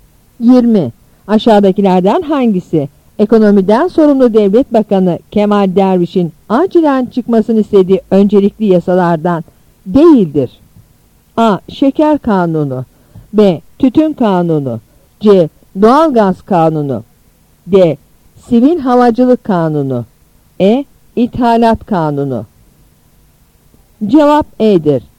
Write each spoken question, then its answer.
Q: Aşağıdakilerden hangisi ekonomiden sorumlu Devlet Bakanı Kemal Derviş'in acilen çıkmasını istediği öncelikli yasalardan değildir?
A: Cevap E'dir.